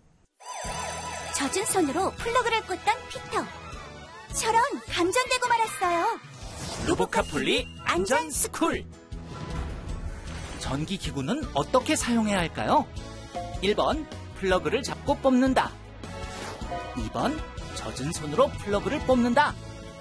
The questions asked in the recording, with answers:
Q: 전기기구는 어떻게 사용해야 할까요?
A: 정답은 1번. 전선이 아닌 플러그를 단단히 잡고 뽑아야 해요.